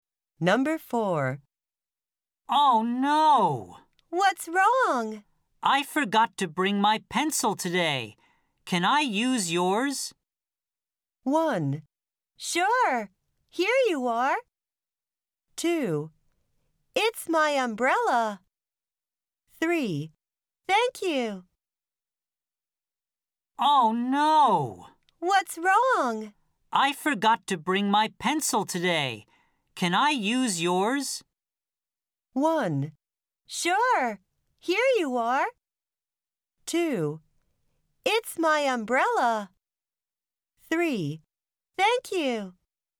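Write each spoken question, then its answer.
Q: Can I use yours?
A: 1: Sure, here you are.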